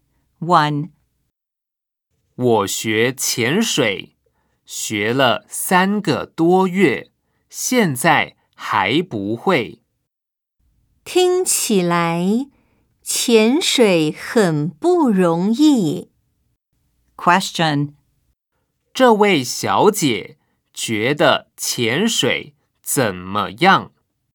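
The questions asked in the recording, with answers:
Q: 这位小姐觉得潜水怎么样?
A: 很不容易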